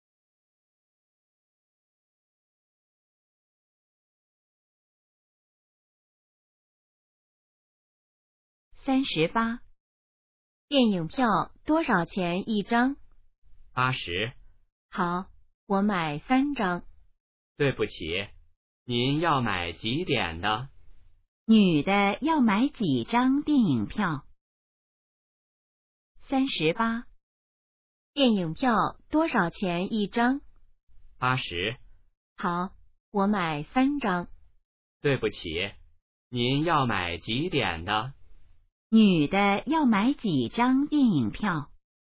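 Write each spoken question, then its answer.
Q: 女的要买几张电影票?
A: 三张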